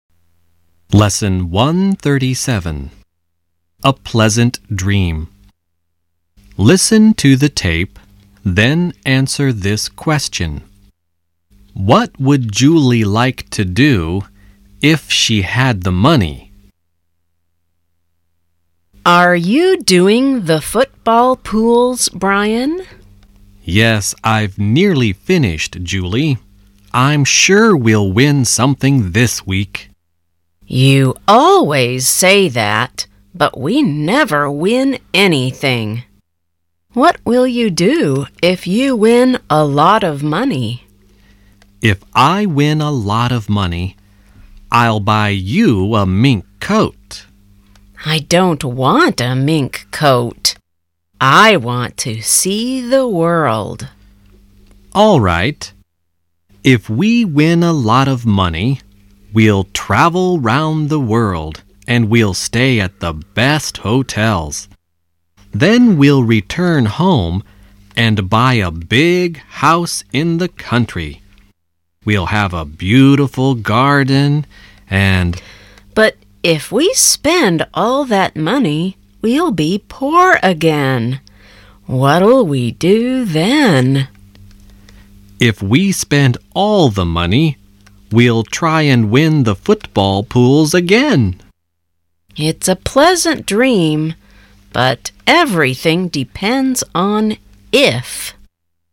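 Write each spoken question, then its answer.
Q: What would Julie like to do if she had the money?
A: See the world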